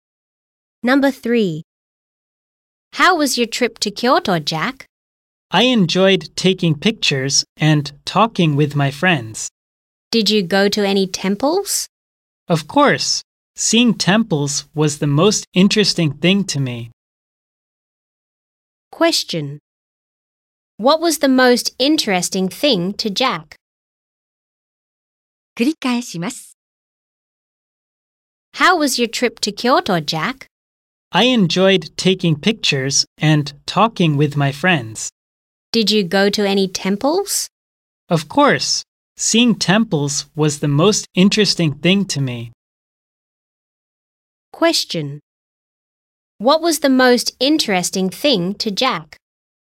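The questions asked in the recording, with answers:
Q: What was the most interesting thing to Jack?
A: Seeing temples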